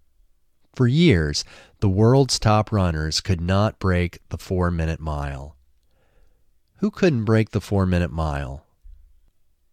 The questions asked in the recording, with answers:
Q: Who couldn't break the 4-minute mile?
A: The world's top runners couldn't break the 4-minute mile.